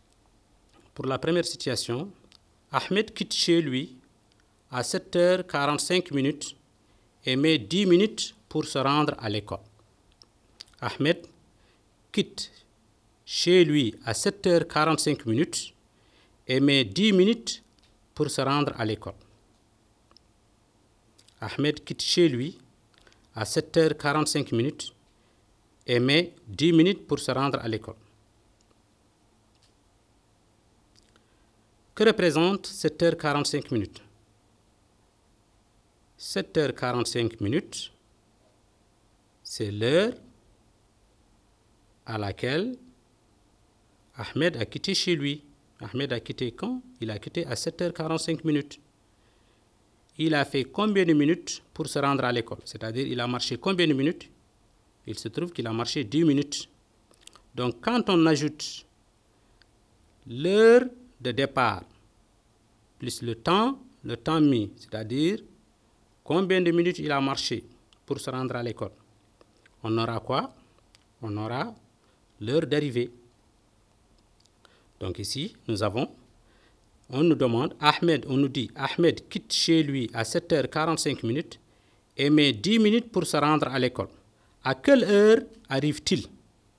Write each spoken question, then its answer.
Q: À quelle heure arrive-t-il?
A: Il va arriver à 7h55.